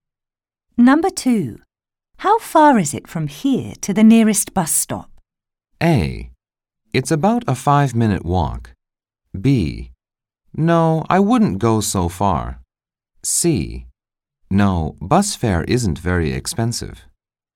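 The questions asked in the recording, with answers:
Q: How far is it from here to the nearest bus stop?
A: A: It's about a 5-minute walk.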